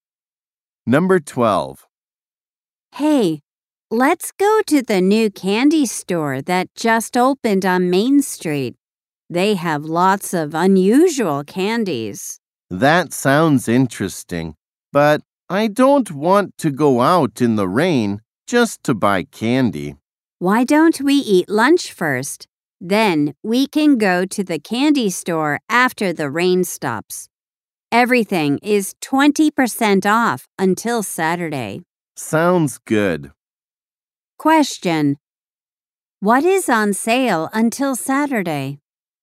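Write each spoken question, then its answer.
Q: What is on sale until Saturday?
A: Everything at the new candy store.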